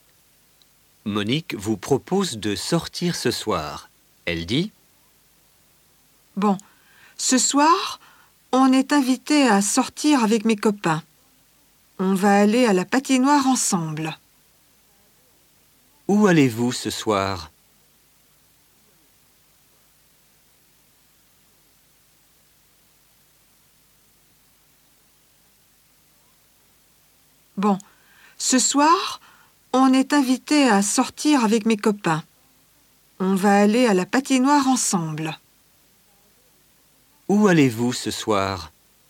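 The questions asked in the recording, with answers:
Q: Où allez-vous ce soir?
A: À la patinoire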